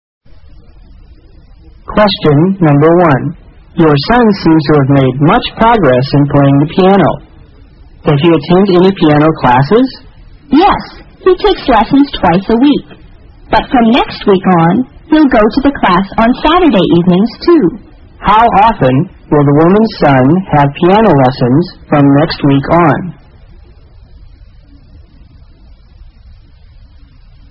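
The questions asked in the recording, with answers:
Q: How often will the woman's son have piano lessons from next week on?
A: Three times a week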